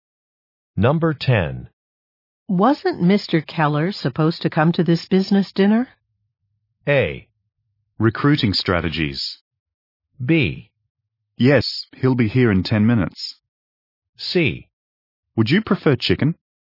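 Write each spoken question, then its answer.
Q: Wasn't Mr. Keller supposed to come to this business dinner?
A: B: Yes, he'll be here in 10 minutes.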